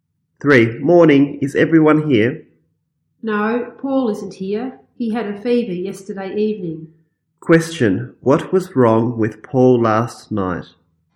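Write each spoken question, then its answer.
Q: What was wrong with Paul last night?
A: He had a fever.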